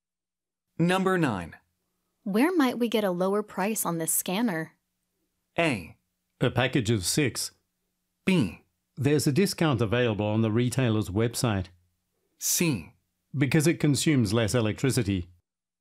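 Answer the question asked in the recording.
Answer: B: There's a discount available on the retailer's website.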